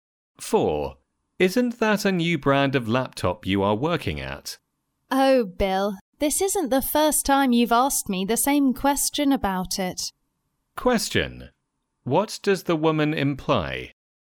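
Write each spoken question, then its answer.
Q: What does the woman imply?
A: Bill has already asked her that question before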